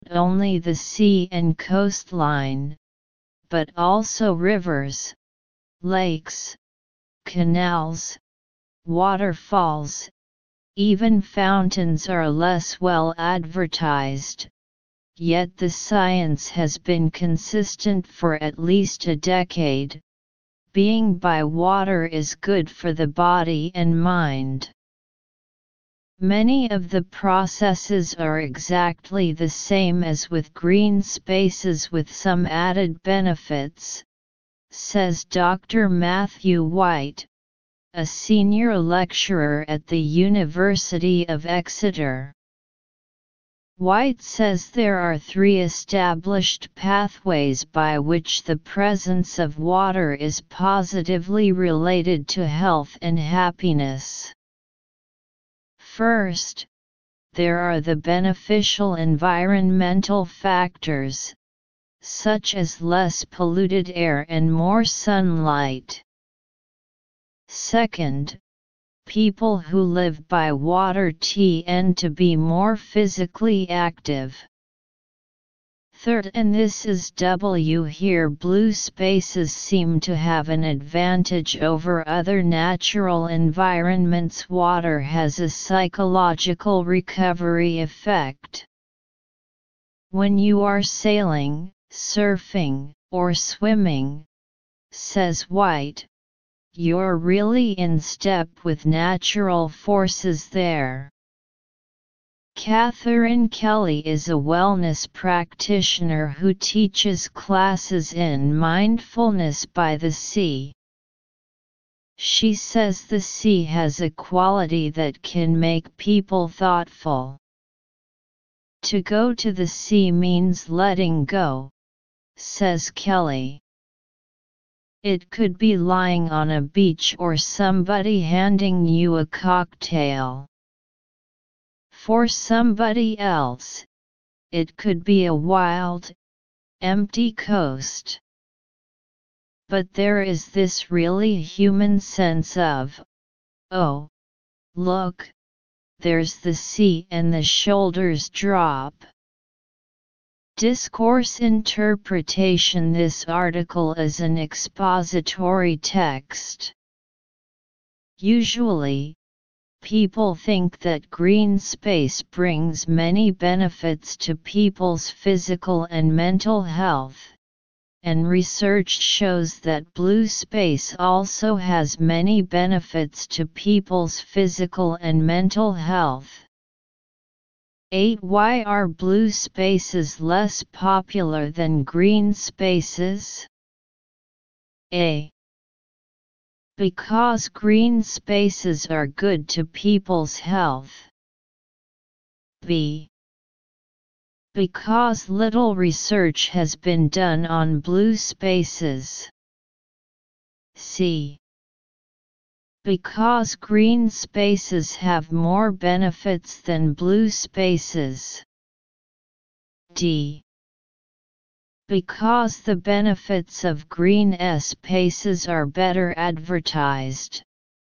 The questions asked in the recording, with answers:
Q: Why are blue spaces less popular than green spaces?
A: Therefore, choose D. Answer, D.